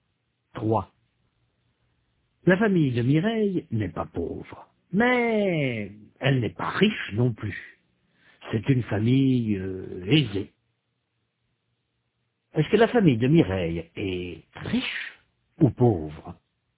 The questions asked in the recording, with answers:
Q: Est-ce que la famille de Mireille est riche ou pauvre?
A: Elle n'est pas pauvre, mais elle n'est pas riche non plus.